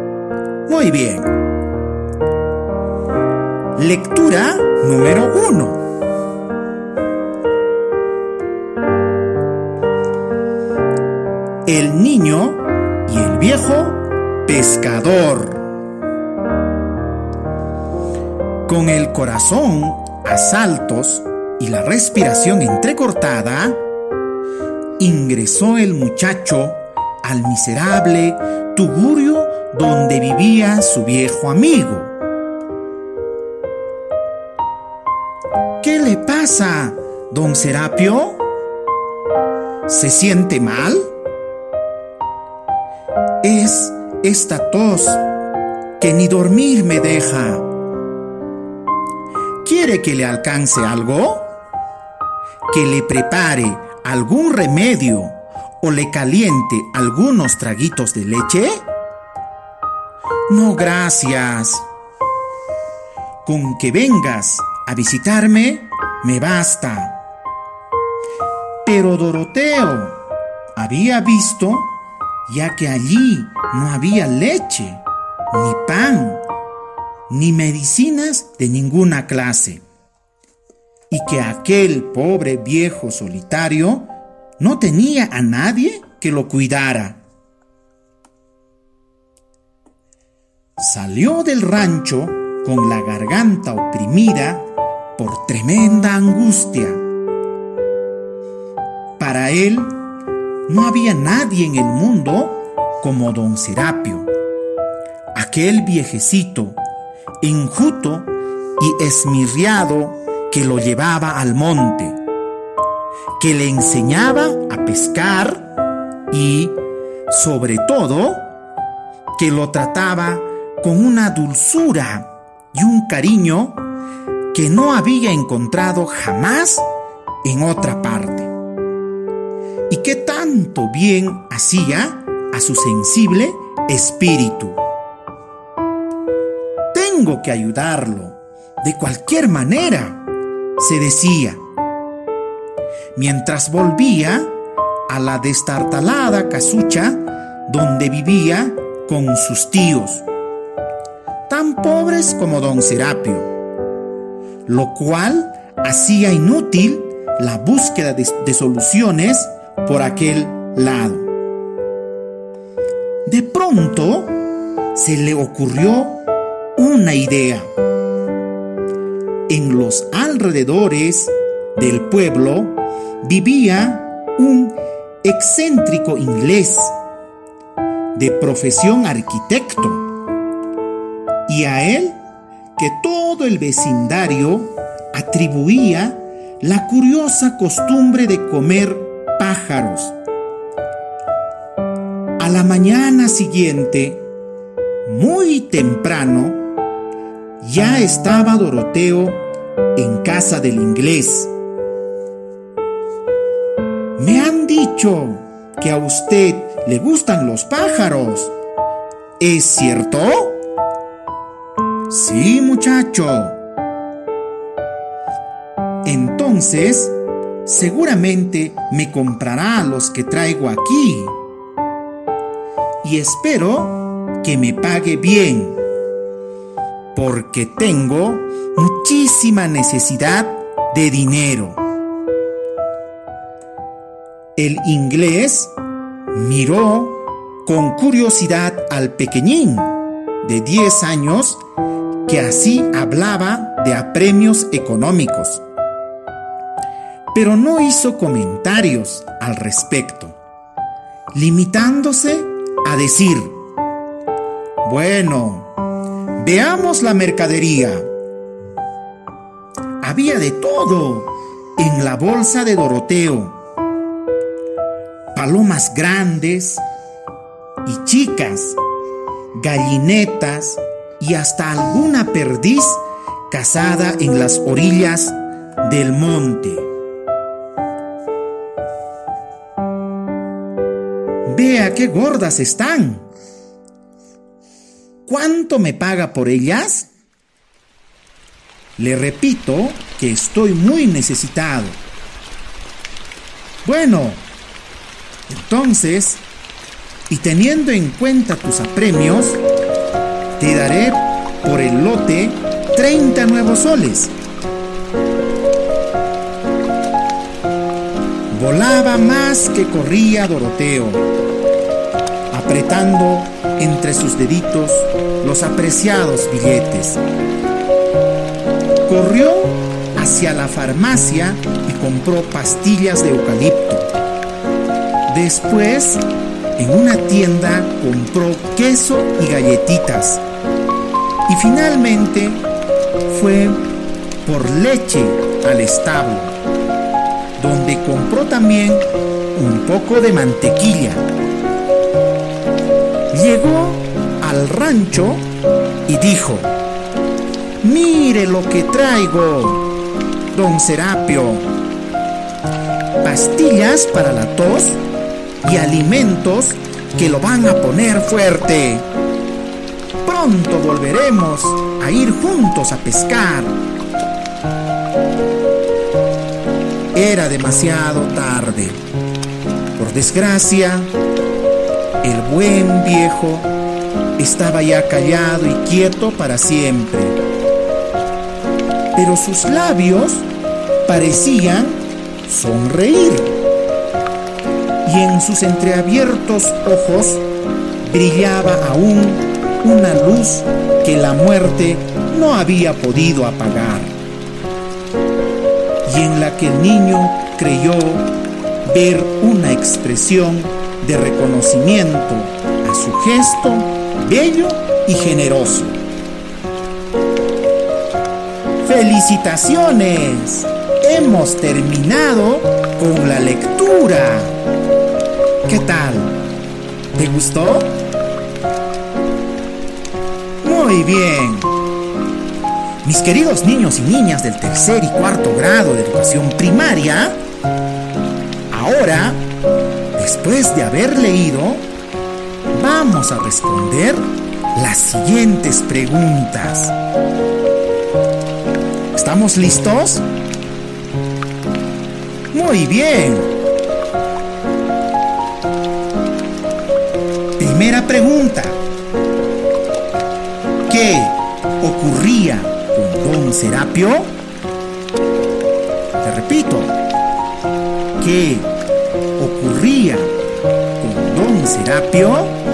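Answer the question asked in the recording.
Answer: Estaba enfermo con una tos que no lo dejaba dormir, y era pobre y vivía solo, sin leche, pan ni medicinas.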